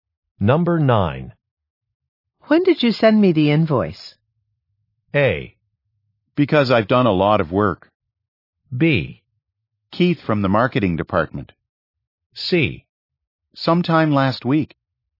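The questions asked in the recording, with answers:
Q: When did you send me the invoice?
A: C: Sometime last week.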